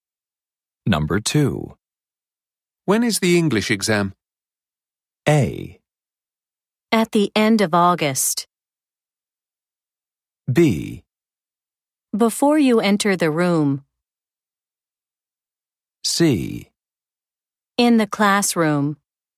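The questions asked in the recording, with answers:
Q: When is the English exam?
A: A: At the end of August.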